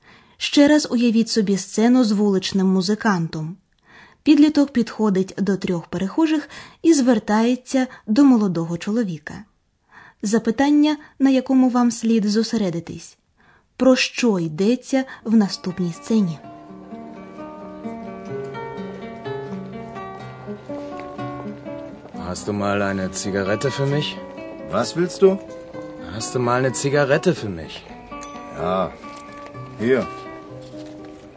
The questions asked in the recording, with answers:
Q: Запитання, на якому вам слід зосередитись, про що йдеться в наступній сцені.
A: Отже, у сцені йдеться про те, що підліток хоче попросити сигарету.